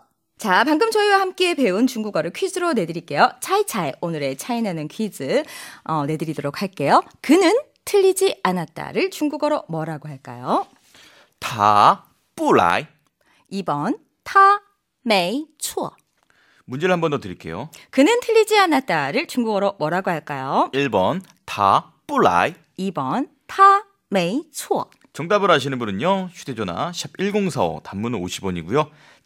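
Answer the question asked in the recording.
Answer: 2: 타, 메이, 추어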